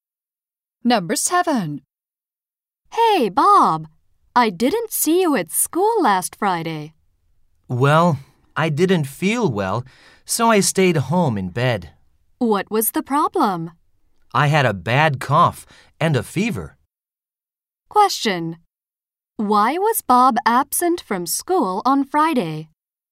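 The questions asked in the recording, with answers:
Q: Why was Bob absent from school on Friday?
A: He was sick with a bad cough and a fever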